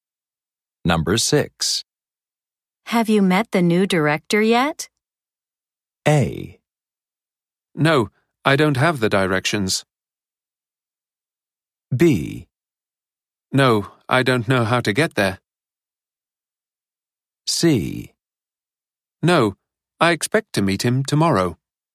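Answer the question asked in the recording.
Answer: C: No, I expect to meet him tomorrow.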